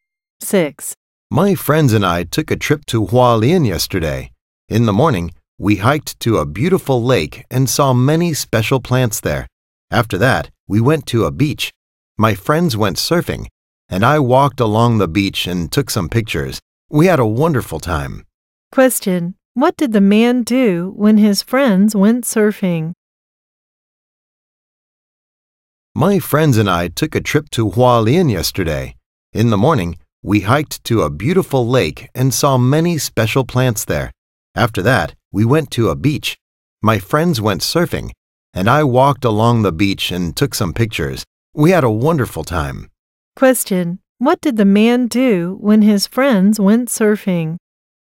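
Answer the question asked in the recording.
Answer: He walked along the beach and took pictures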